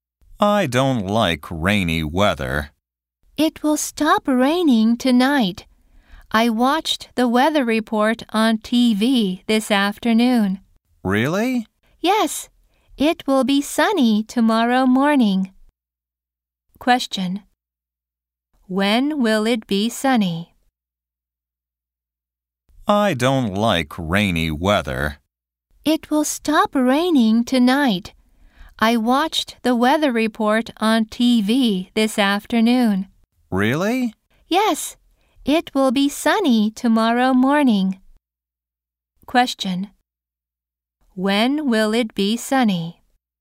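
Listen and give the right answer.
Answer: Tomorrow morning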